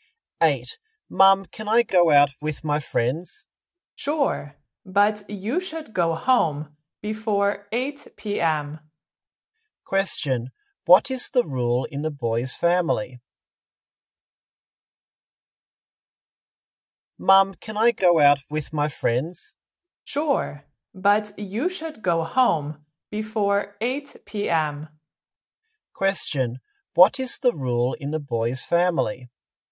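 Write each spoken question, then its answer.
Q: what is the rule in the boy's family?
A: He should go home before 8 p.m.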